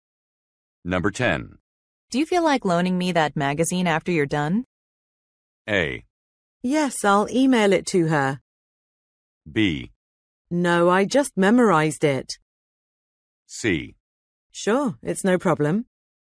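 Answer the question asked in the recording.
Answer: C: Sure, it's no problem.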